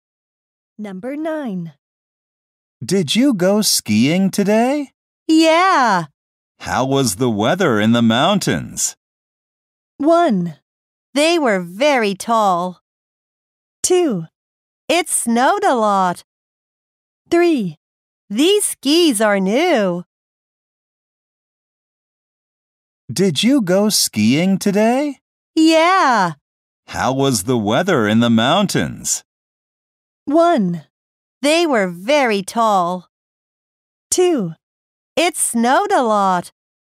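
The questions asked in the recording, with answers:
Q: How was the weather in the mountains?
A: 2: It snowed a lot.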